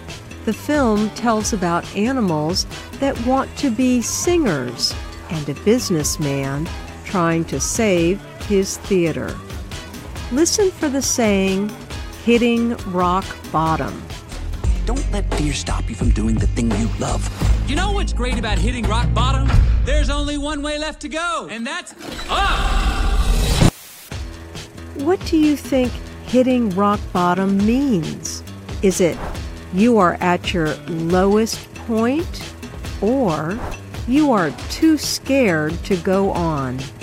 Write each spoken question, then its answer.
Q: What do you think hitting rock bottom means?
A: Hitting rock bottom means you are at your lowest point.